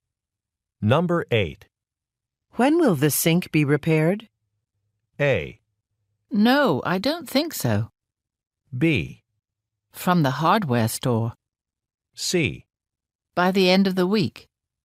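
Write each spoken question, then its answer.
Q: When will the sink be repaired?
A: C: By the end of the week.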